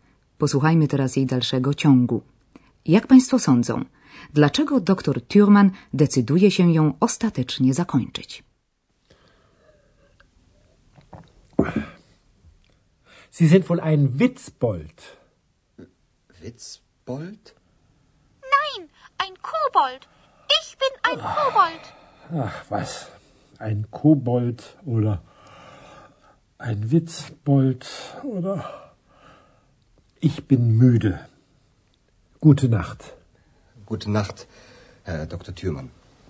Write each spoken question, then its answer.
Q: Jak Państwo sądzą, dlaczego dr Thurman decyduje się ją ostatecznie zakończyć?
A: Doktor Thürmann przerywa zatem rozmowę, ponieważ jest senny i zmęczony, czyli müde.